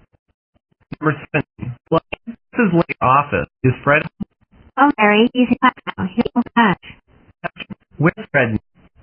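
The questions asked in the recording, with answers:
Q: Where's Fred?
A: In class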